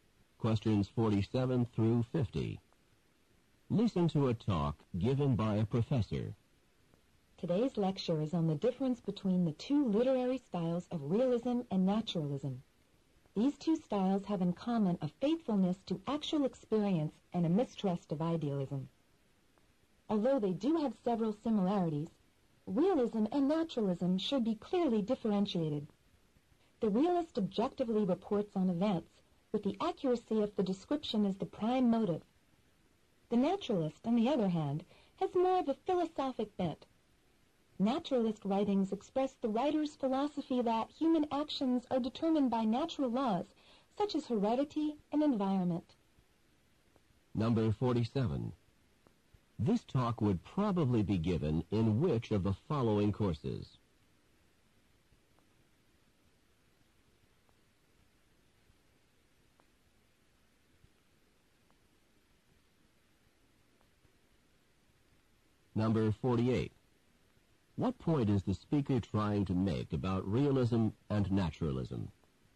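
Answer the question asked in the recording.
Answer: They should be clearly differentiated despite similarities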